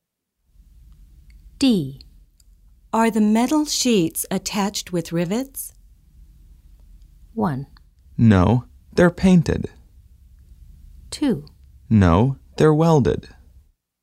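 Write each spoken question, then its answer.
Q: Are the metal sheets attached with rivets?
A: 2: No, they're welded.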